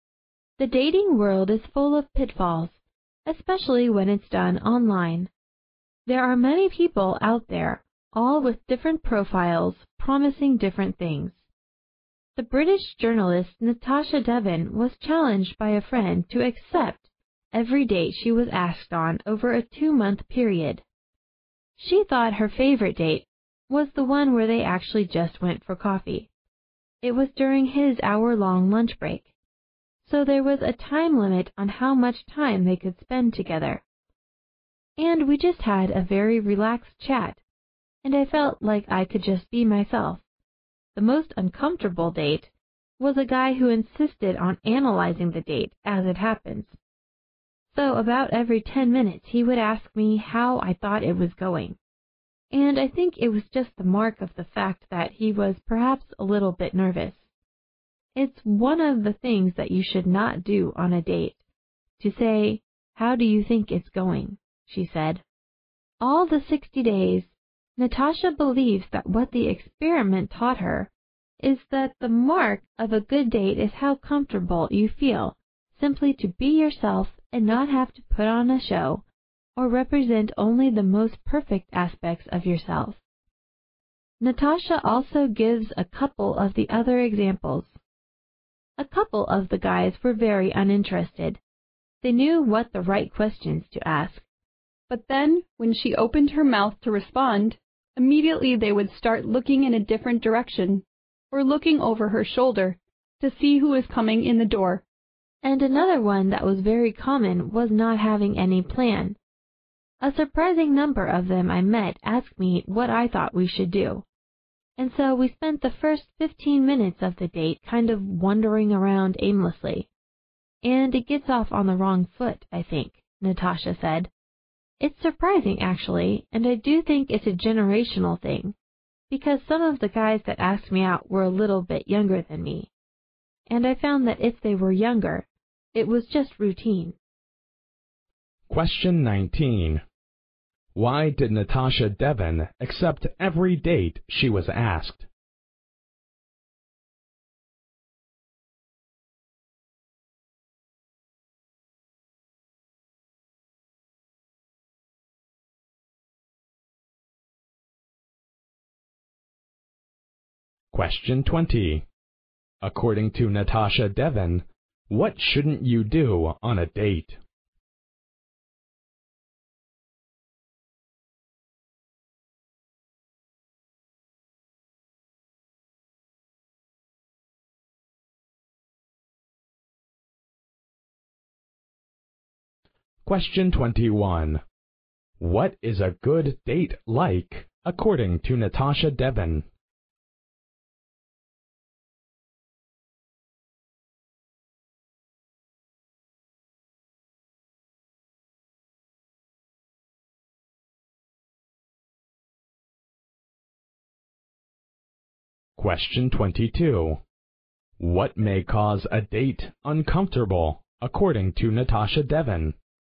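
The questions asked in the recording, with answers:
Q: Why did Natasha Devon accept every date she was asked?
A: Because a friend challenged her to

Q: According to Natasha Devon, what shouldn't you do on a date?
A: Ask how the date is going

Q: What is a good date like, according to Natasha Devon?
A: One where you feel comfortable being yourself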